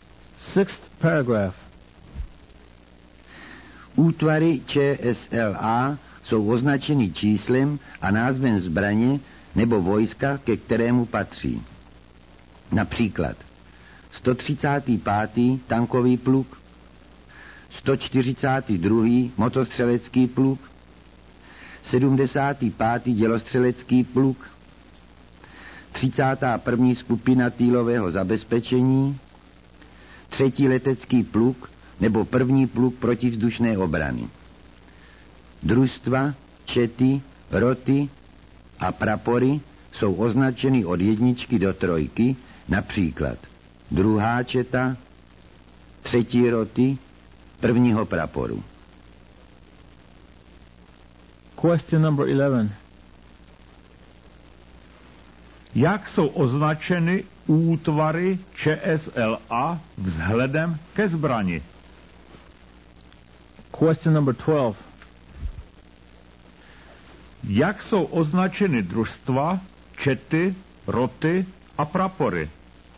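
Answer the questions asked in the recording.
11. číslem a názvem zbraně nebo vojska, ke kterému patří
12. od jedničky do trojky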